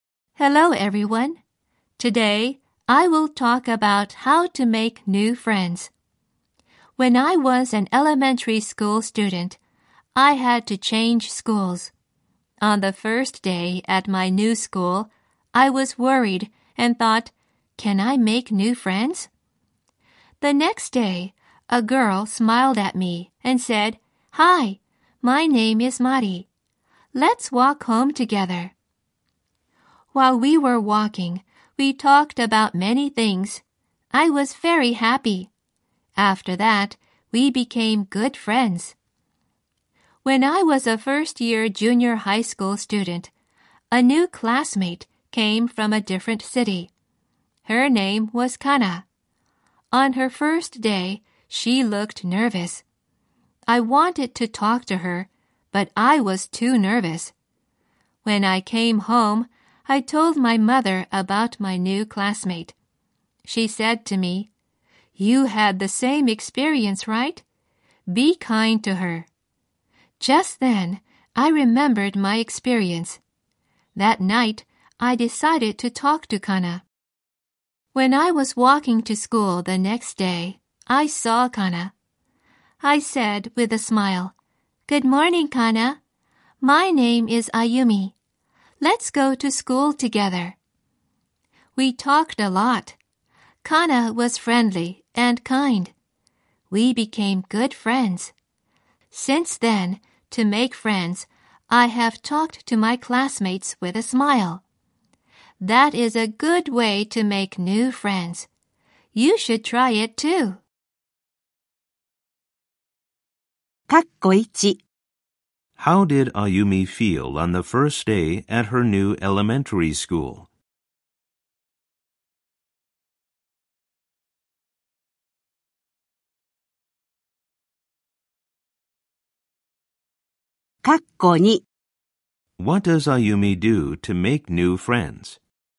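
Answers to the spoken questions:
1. She was worried.
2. She talks to her classmates with a smile.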